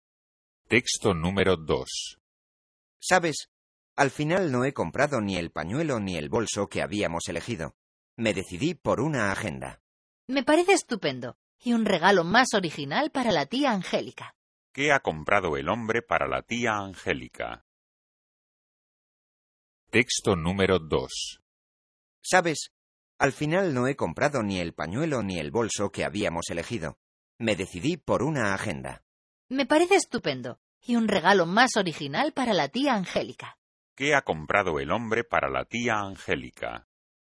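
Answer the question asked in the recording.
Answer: Una agenda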